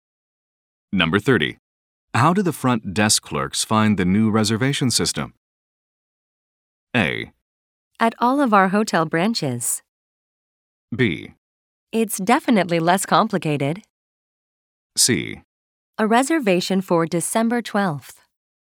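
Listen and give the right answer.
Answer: B: It's definitely less complicated.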